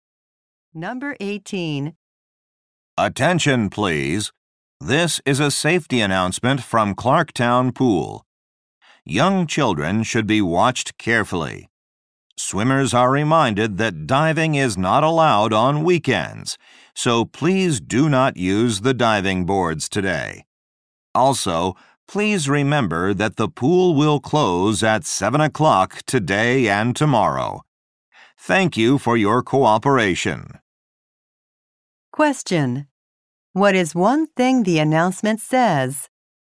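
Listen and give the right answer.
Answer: Diving is not allowed today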